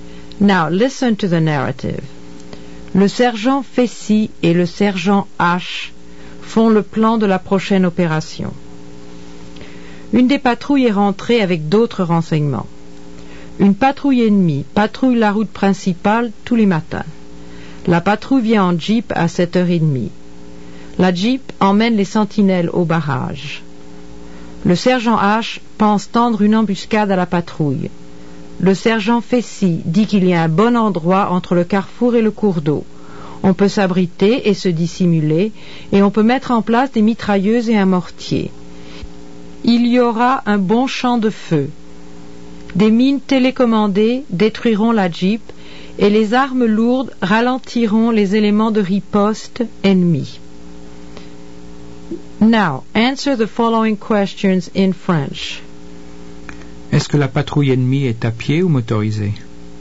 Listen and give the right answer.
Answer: La patrouille est motorisée.